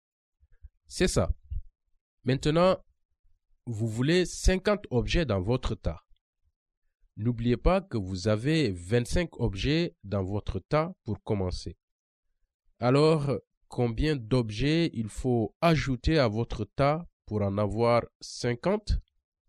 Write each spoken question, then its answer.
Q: Alors, combien d'objets il faut ajouter à votre tas pour en avoir 50?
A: 25 de plus?